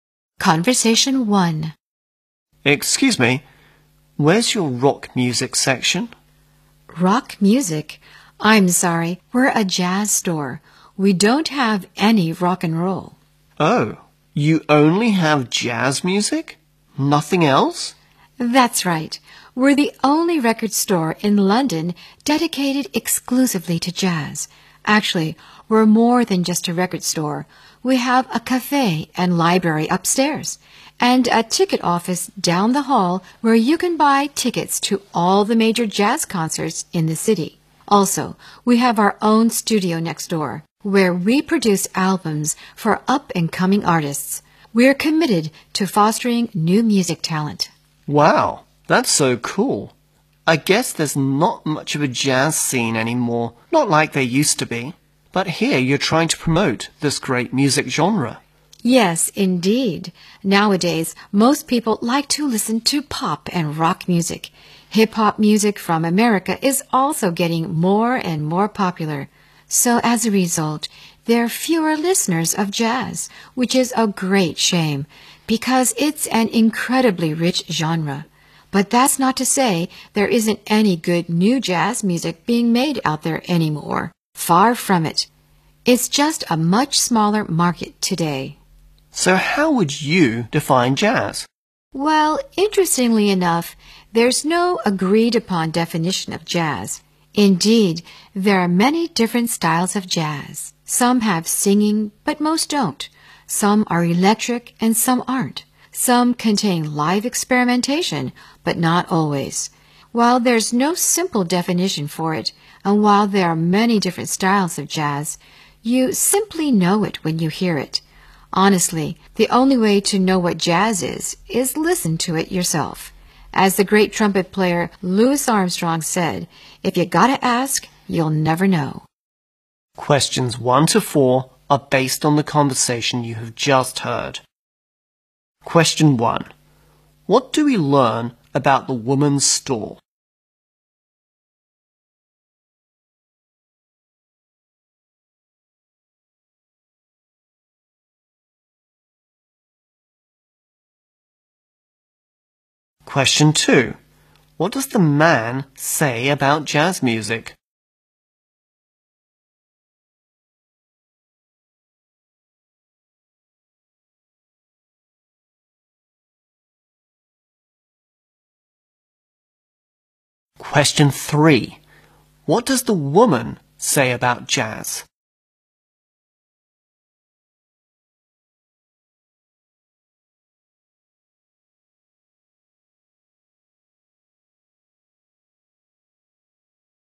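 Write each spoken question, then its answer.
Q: What do we learn about the woman's store?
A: It sells only jazz music and also has a cafe, library, ticket office and studio.

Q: What does the man say about jazz music?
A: There isn't much of a jazz scene anymore.

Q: What does the woman say about jazz?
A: There is no agreed-upon definition of it.

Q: What should you do to appreciate different styles of jazz according to the woman?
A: Listen to it yourself.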